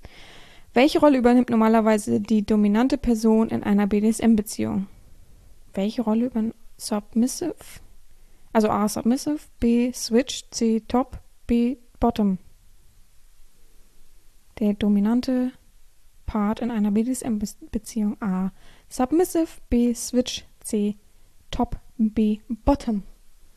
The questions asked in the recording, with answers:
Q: Welche Rolle übernimmt normalerweise die dominante Person in einer BDSM-Beziehung?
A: Antwort 4 ist C, Top.